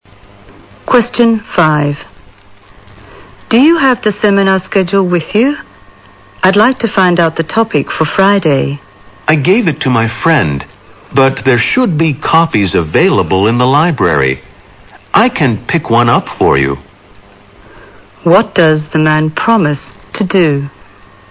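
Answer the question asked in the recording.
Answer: Pick up a copy of the seminar schedule from the library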